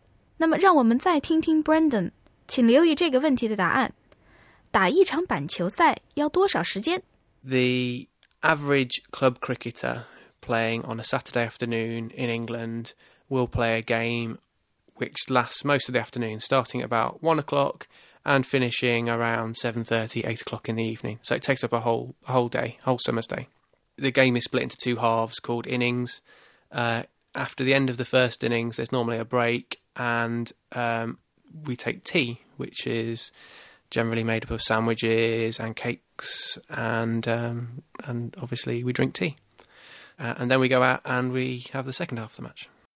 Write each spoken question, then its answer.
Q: 打一场板球赛要多少时间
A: A cricket match typically lasts a whole summer's day, from around 1 p.m.